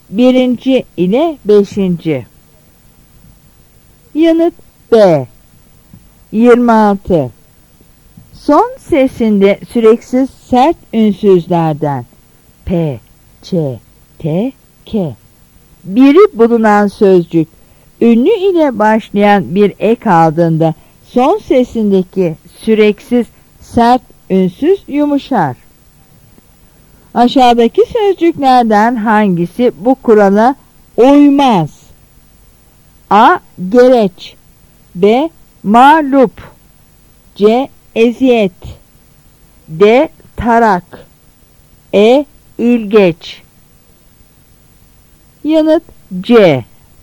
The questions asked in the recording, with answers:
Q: Aşağıdaki sözcüklerden hangisi bu kurala uymaz?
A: Yanıt C.